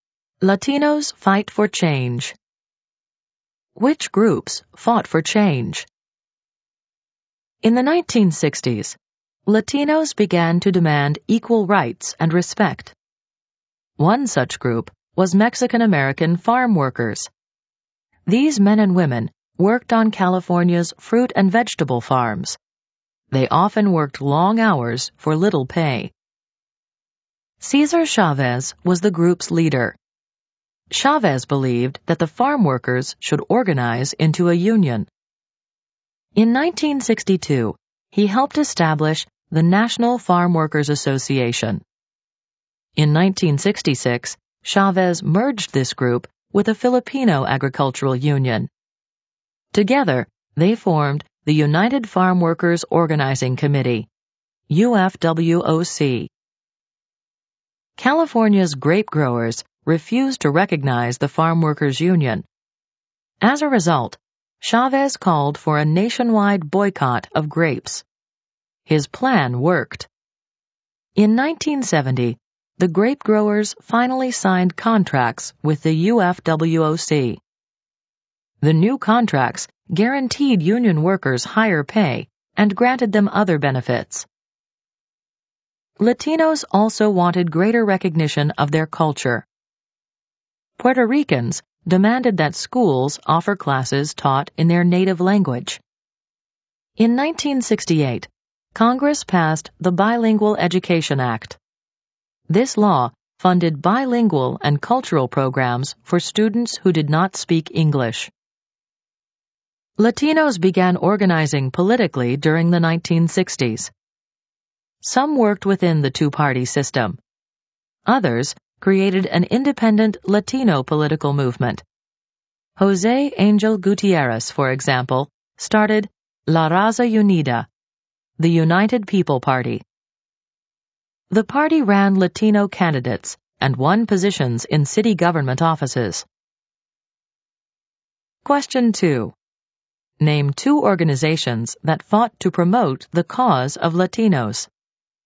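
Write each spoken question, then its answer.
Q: Name two organizations that fought to promote the cause of Latinos.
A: National Farm Workers Association/UFWOC and La Raza Unida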